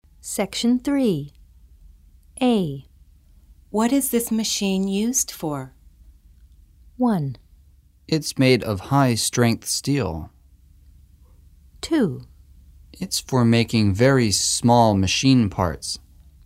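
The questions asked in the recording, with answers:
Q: What is this machine used for?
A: 2: It's for making very small machine parts.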